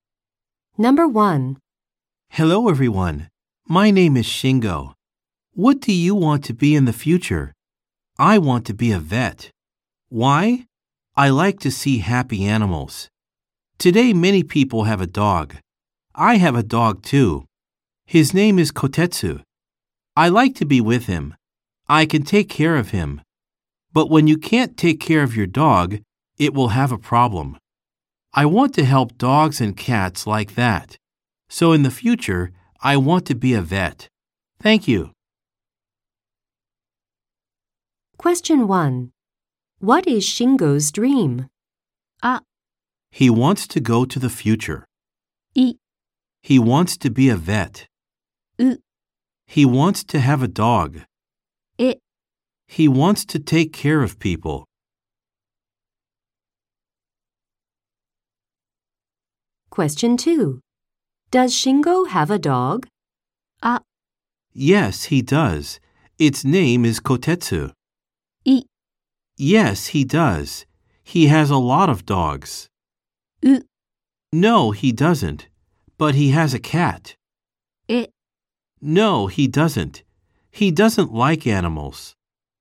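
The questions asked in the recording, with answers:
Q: What is Shingo's dream?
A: い: He wants to be a vet.

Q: Does Shingo have a dog?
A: あ: Yes, he does. Its name is Kotetsu.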